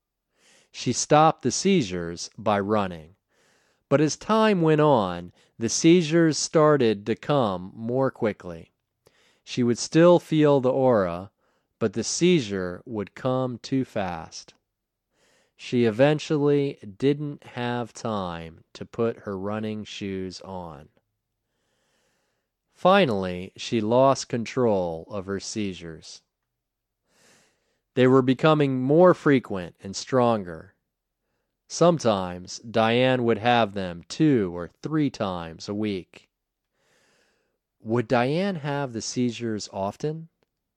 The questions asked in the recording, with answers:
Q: Would Diane have the seizures often?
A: Yes, Diane would have the seizures often.